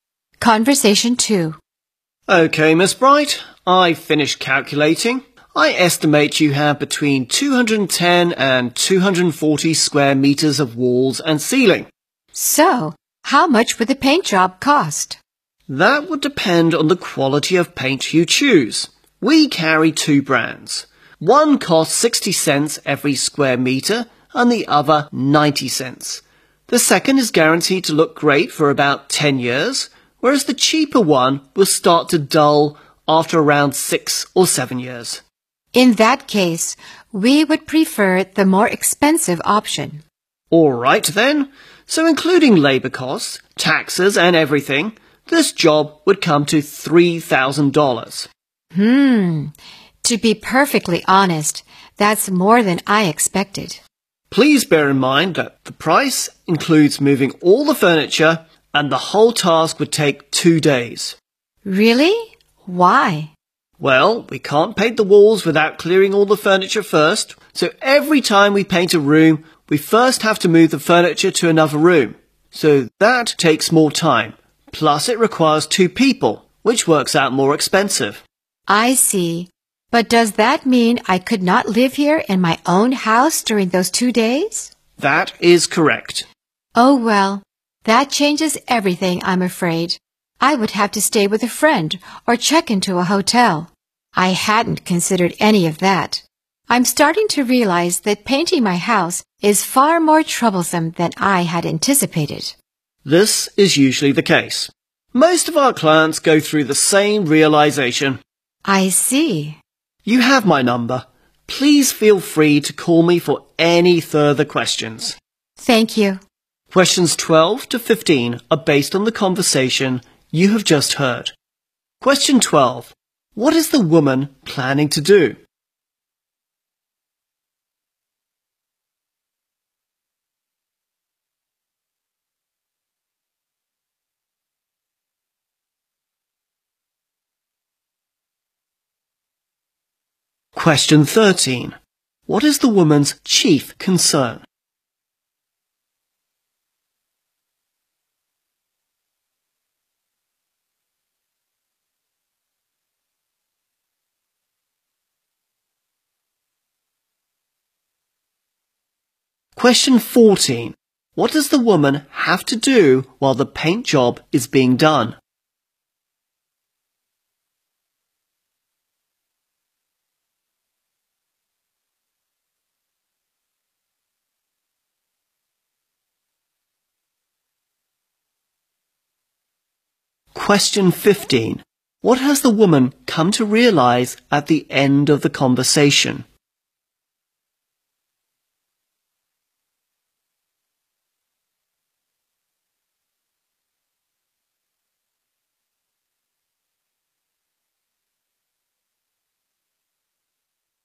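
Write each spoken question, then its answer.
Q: What is the woman planning to do?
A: Have her house painted

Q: What does the woman have to do while the paint job is being done?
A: Stay with a friend or in a hotel

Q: What has the woman come to realize at the end of the conversation?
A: Painting her house is far more troublesome than she had expected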